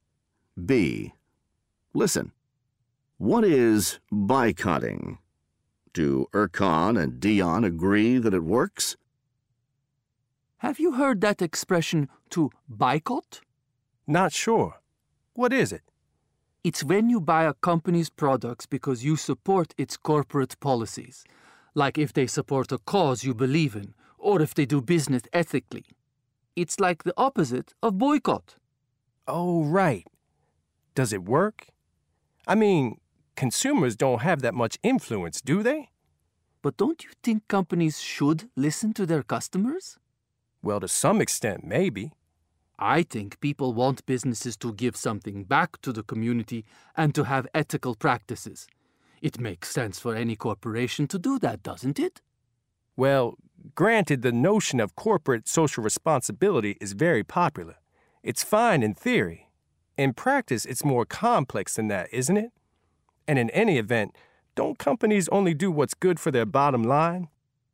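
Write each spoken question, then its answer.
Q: Do Erkan and Dion agree that it works?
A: No, they don't agree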